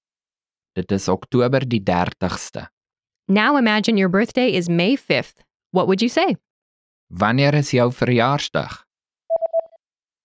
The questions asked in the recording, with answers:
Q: What would you say? Wanneer is jou verjaarsdag?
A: Dit is Mei die 5de.